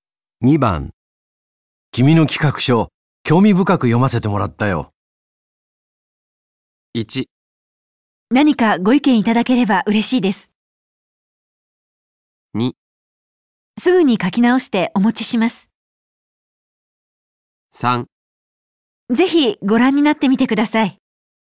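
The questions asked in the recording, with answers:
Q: 君の企画書、興味深く読ませてもらったよ。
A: 1: 何かご意見いただければ嬉しいです。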